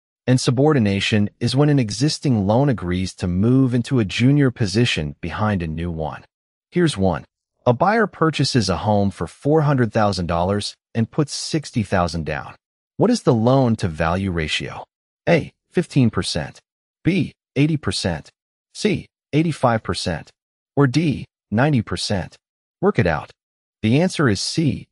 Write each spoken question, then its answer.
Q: What is the loan-to-value ratio?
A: The answer is C. 85%.